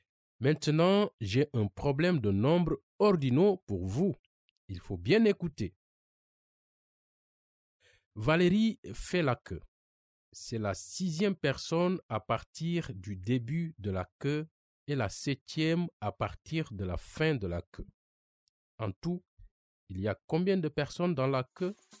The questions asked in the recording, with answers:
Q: En tout, il y a combien de personnes dans la queue?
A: Oh, la réponse, c'est 12 personnes.